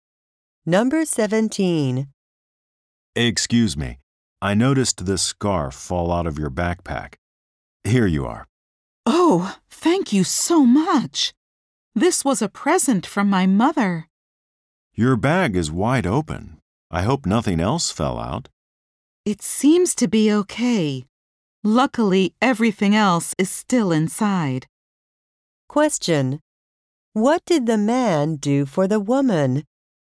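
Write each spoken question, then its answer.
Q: What did the man do for the woman?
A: He picked up the scarf that fell out of her backpack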